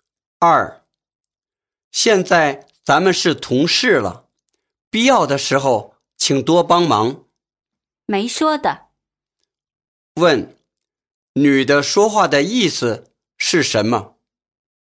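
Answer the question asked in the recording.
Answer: 一定会帮忙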